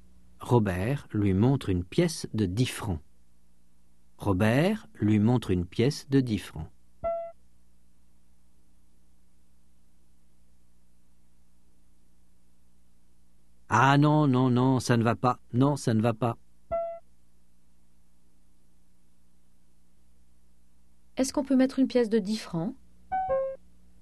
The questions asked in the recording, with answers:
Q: Est-ce qu'on peut mettre une pièce de 10 francs ?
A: Non, ça ne va pas.